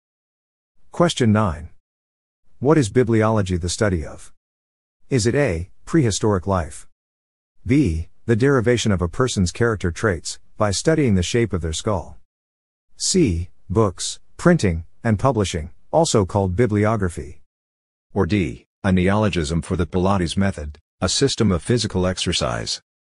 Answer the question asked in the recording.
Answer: The answer is C, books, printing, and publishing, also called bibliography.